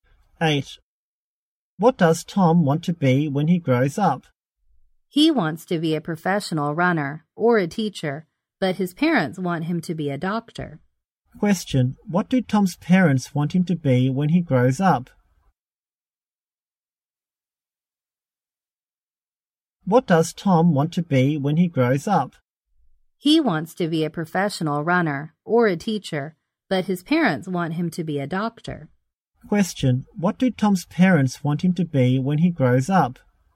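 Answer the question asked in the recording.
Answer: A doctor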